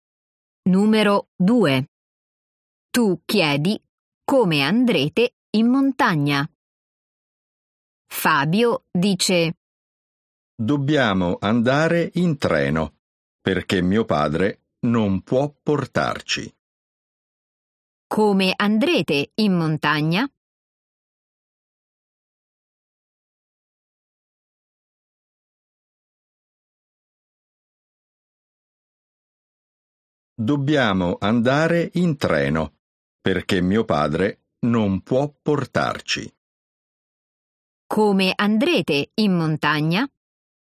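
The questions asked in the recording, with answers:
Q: Come andrete in montagna?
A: In treno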